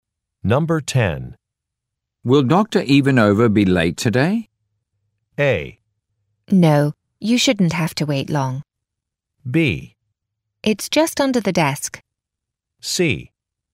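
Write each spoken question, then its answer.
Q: Will Dr. Ivanova be late today?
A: A: No, you shouldn't have to wait long.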